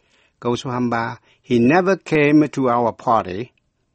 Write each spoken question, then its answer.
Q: He never came to our party.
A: Quý vị có trả lời là did he?